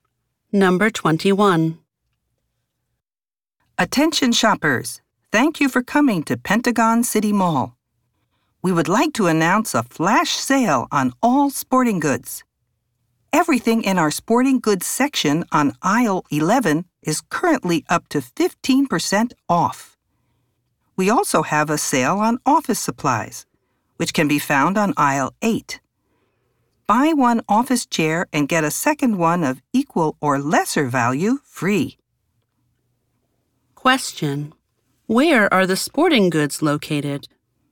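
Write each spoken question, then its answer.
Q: Where are the sporting goods located?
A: On aisle 11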